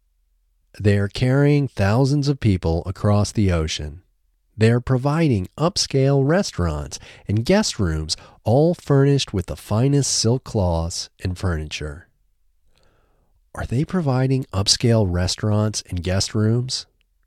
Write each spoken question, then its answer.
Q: Are they providing upscale restaurants and guest rooms?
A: Yes, they are providing upscale restaurants and guest rooms.